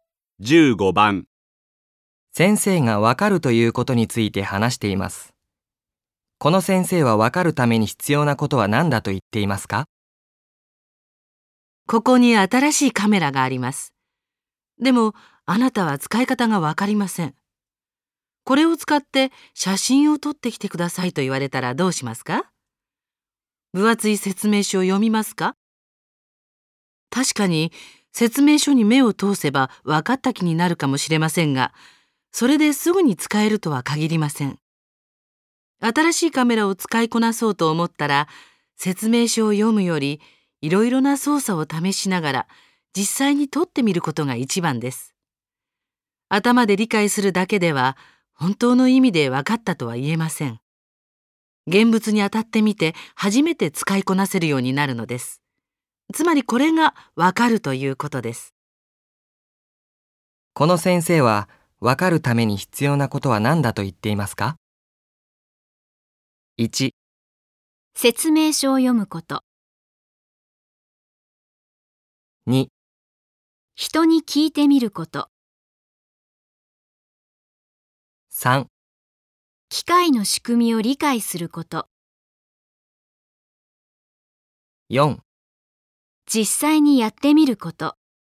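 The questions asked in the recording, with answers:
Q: この先生はわかるために必要なことは何だと言っていますか?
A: 4: 実際にやってみること。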